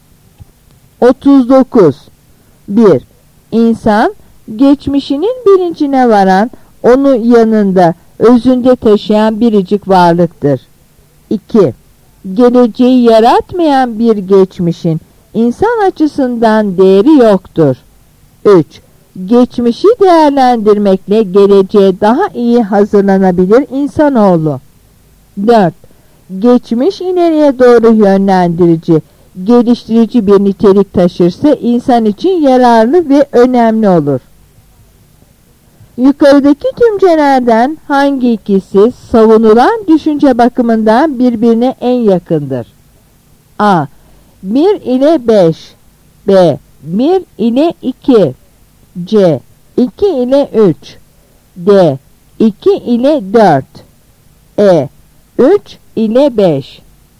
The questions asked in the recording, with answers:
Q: Yukarıdaki cümlelerden hangi ikisi savunulan düşünce bakımından birbirine en yakındır?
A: Yanıt D.